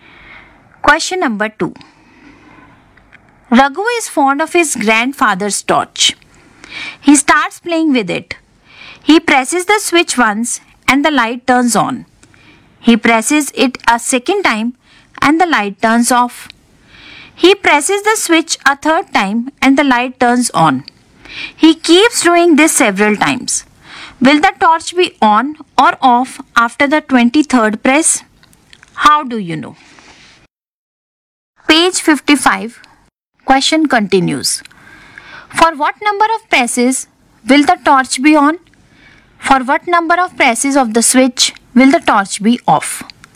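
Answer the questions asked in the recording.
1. On
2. Odd numbers of presses
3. Even numbers of presses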